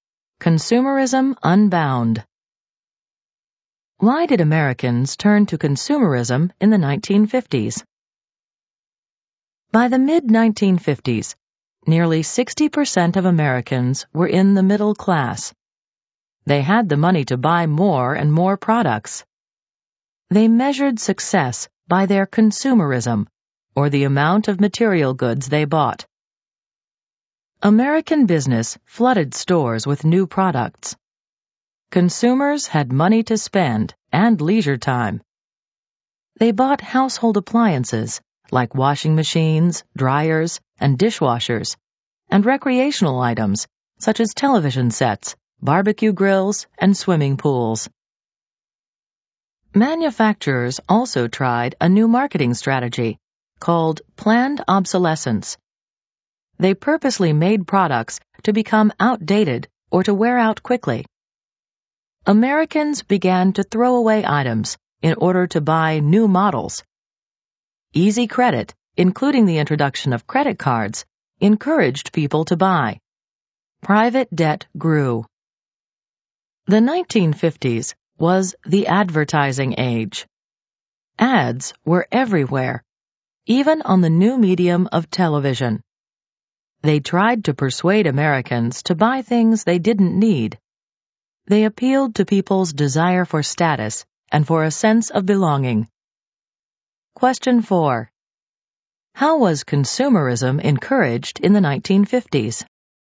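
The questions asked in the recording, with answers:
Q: How was consumerism encouraged in the 1950s?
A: Consumerism was encouraged by new products, planned obsolescence, easy credit such as credit cards, and advertising, including on TV, that appealed to people's desire for status and belonging.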